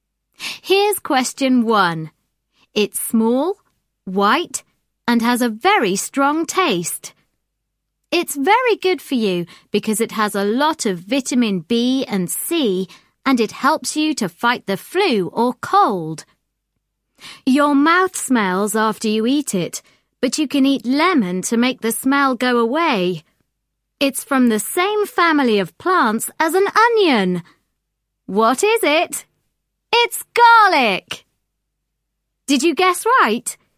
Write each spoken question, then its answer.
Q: What is it?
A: It's garlic!